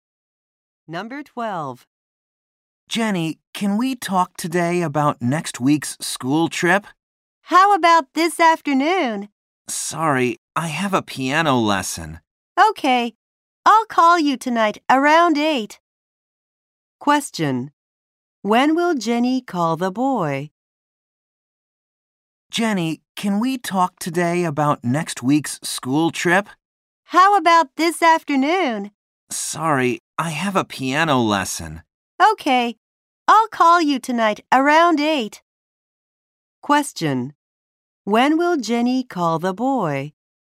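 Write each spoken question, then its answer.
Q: When will Jenny call the boy?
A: Tonight around 8.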